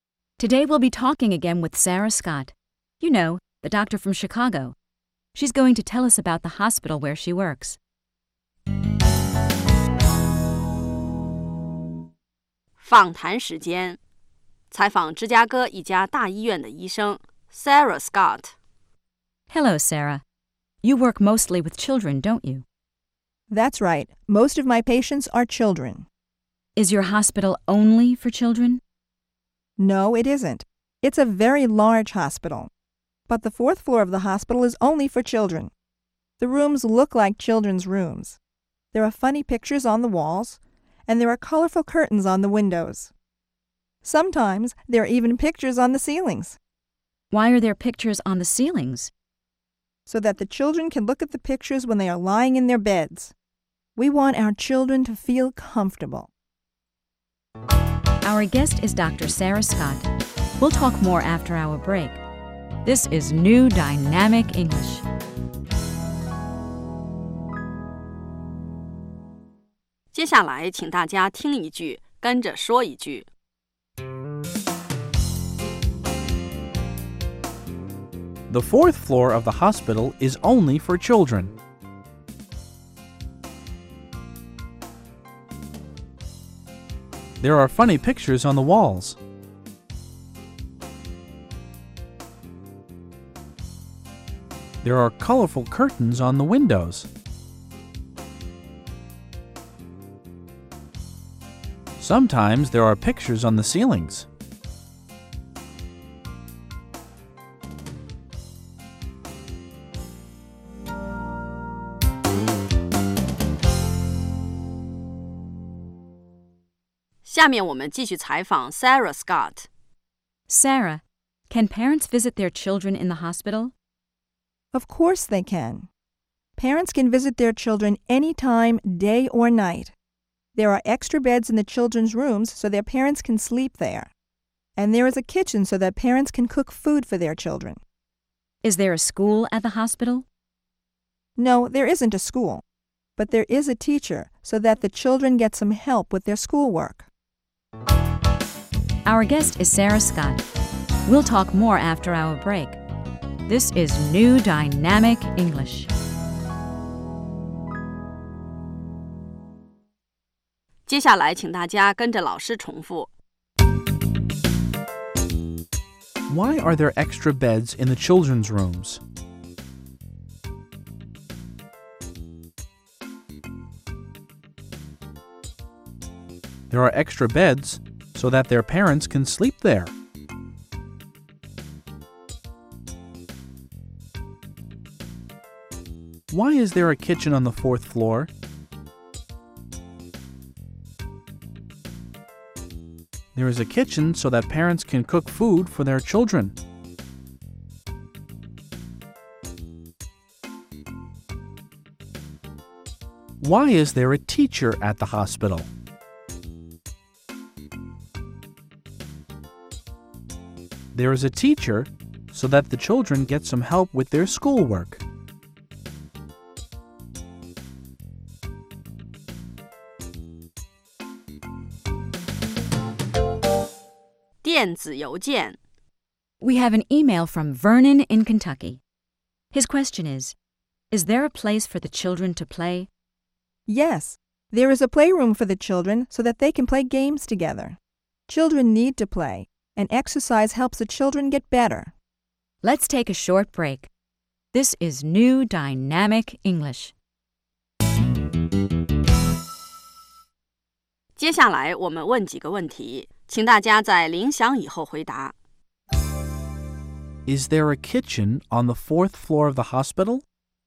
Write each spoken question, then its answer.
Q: Is there a kitchen on the fourth floor of the hospital?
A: Yes, there is. There is a kitchen so that parents can cook for their children.